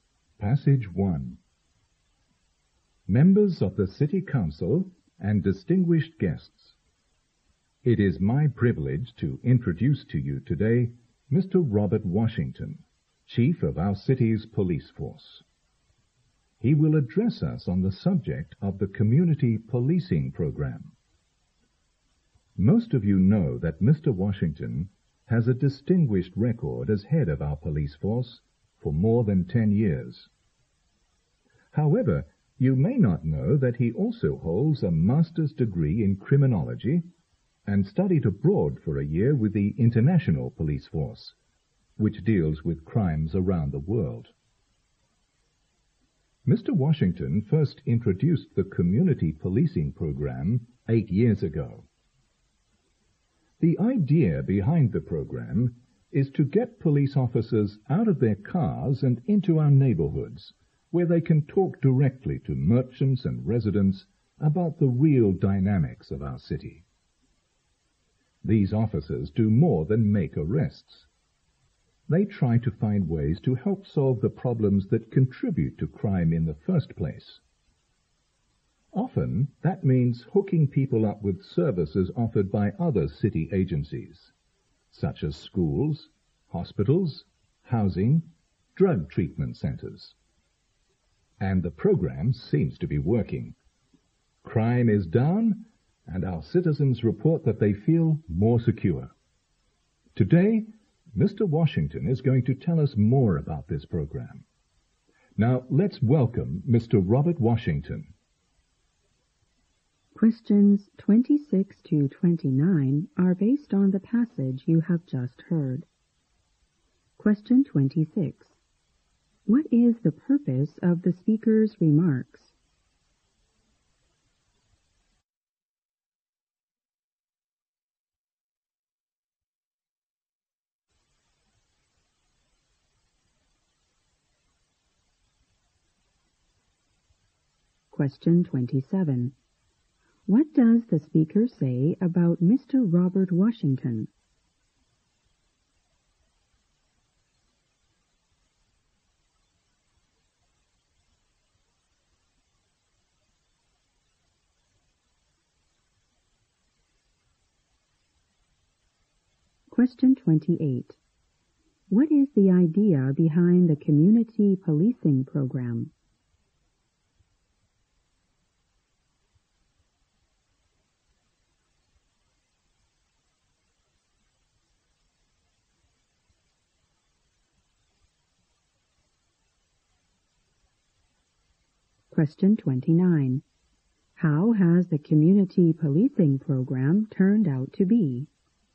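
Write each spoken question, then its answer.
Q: What is the purpose of the speaker's remarks?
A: To introduce Mr. Robert Washington, the police chief, to the audience

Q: What is the idea behind the Community Policing Program?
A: To get police officers out of their cars and into neighborhoods to talk with merchants and residents

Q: How has the Community Policing Program turned out to be?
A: Successful: crime is down and citizens feel more secure.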